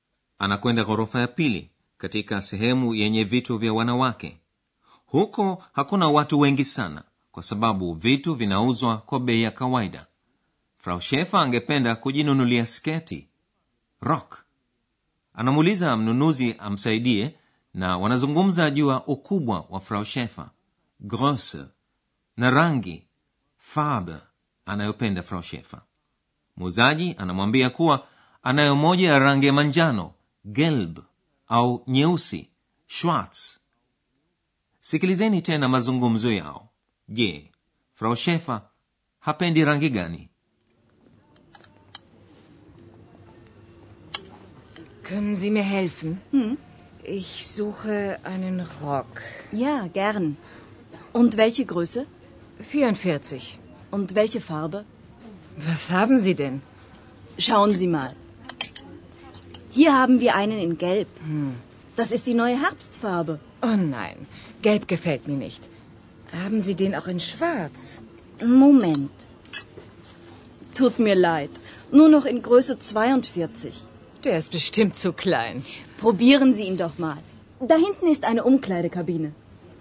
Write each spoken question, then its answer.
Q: je frau shefer hapendi rangi gani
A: Frau Schäfer hapendi rangi ya manjano.